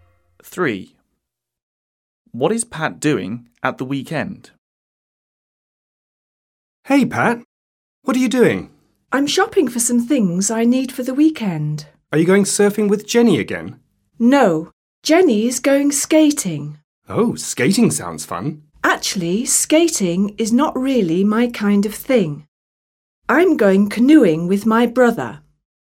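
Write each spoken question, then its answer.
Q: What is Pat doing at the weekend?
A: Going canoeing with his brother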